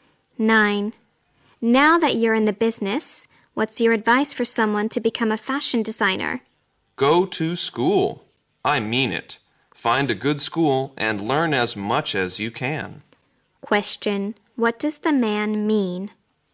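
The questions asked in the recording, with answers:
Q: Question. What does the man mean?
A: Go to a good school and learn as much as possible.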